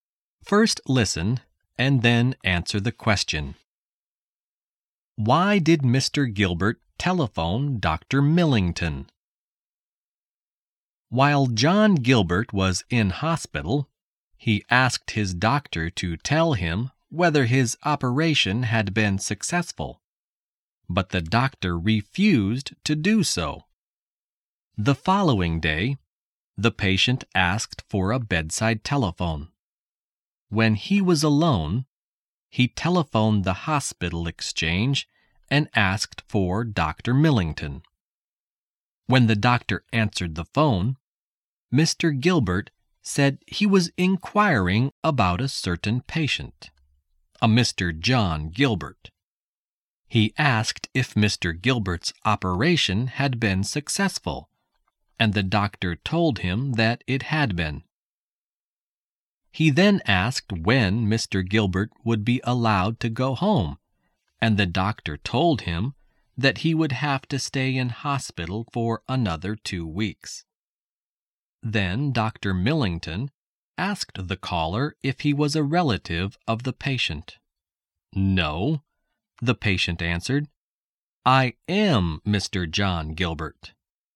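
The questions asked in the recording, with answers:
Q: Why did Mr. Gilbert telephone Dr. Millington?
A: To find out whether his operation had been successful, since the doctor had refused to tell him.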